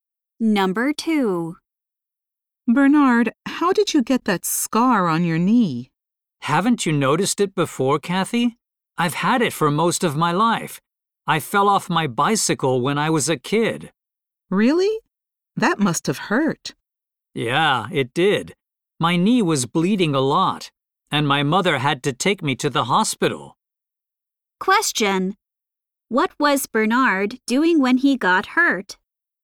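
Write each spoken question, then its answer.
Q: What was Bernard doing when he got hurt?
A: Riding his bicycle.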